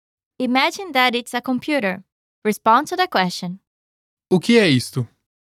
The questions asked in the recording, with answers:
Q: O que é isto?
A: É um computador.